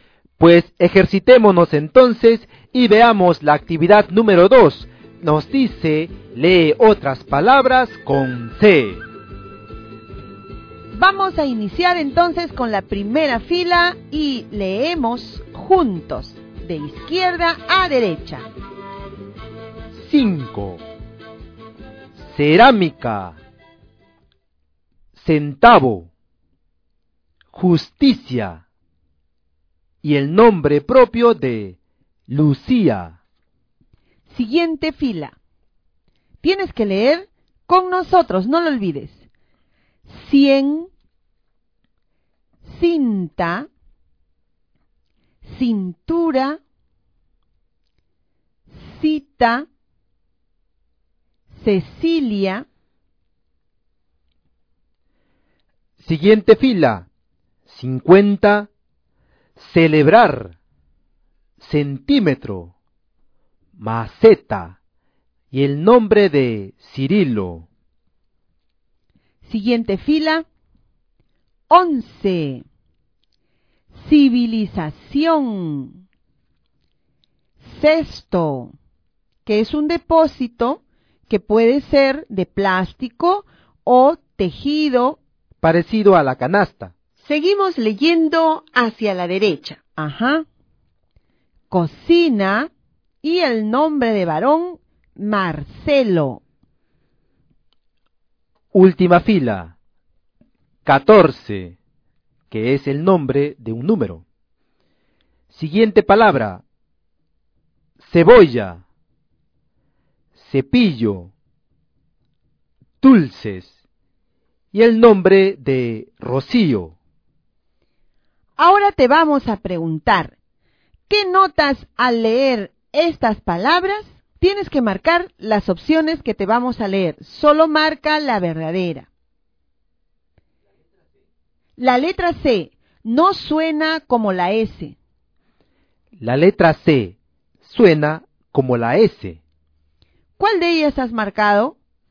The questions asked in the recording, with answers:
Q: ¿qué notas al leer estas palabras?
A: la letra C suena como S cuando está acompañada de la letra E y la letra I.